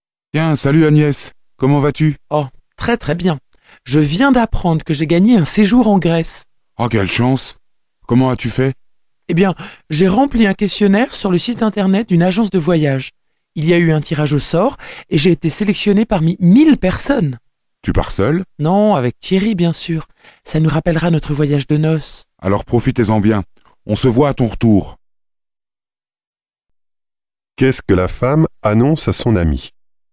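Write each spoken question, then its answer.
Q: Qu'est-ce que la femme annonce à son ami?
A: Elle a gagné un séjour en Grèce.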